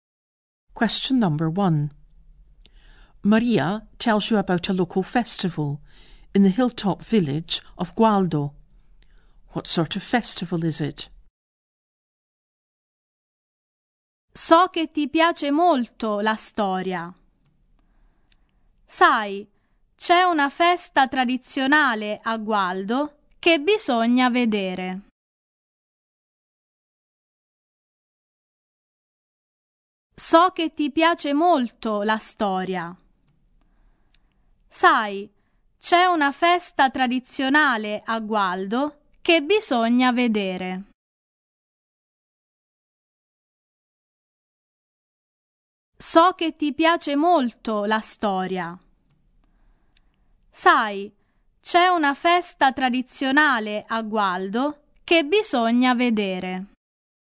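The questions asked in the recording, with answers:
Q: What sort of festival is it?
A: A traditional festival (of interest if you like history)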